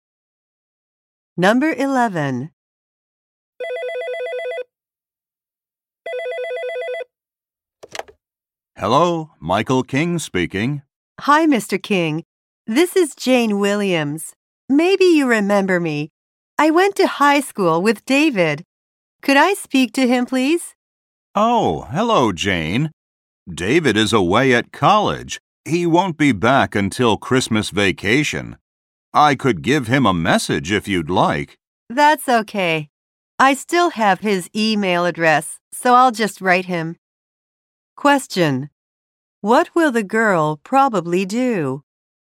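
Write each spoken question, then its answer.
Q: What will the girl probably do?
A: Send David an email.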